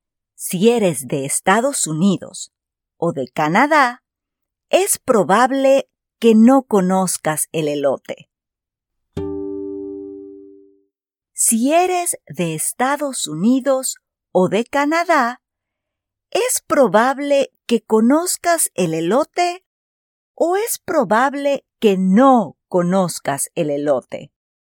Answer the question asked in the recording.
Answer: Exacto. Si eres de Estados Unidos o de Canadá, es probable que no conozcas el elote.